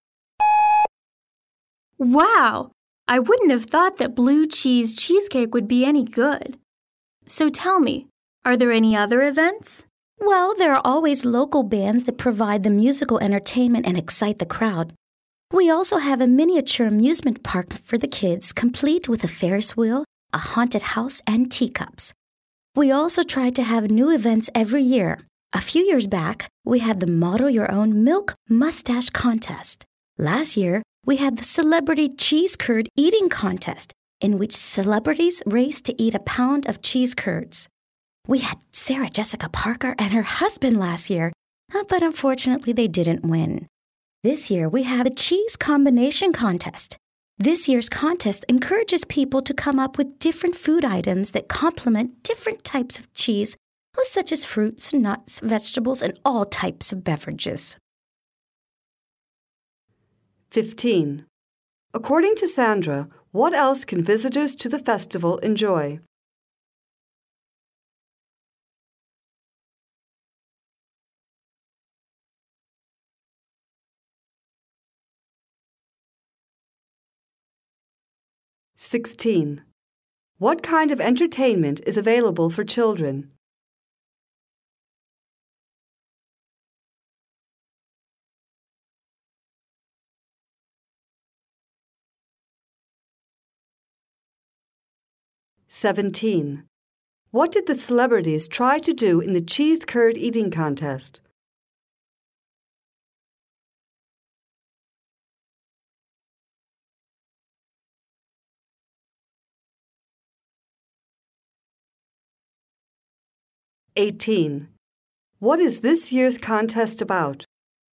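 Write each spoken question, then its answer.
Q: What kind of entertainment is available for children?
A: A miniature amusement park

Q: What did the celebrities try to do in the cheese curd eating contest?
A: Eat a pound of cheese curds the fastest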